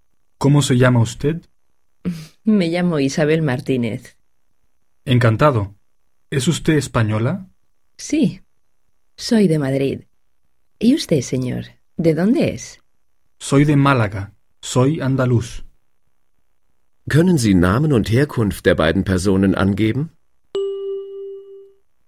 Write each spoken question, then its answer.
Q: ¿Können Sie Namen und Herkunft der beiden Personen angeben?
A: Es sind Isabel Martínez aus Madrid und Felipe Sánchez aus Málaga.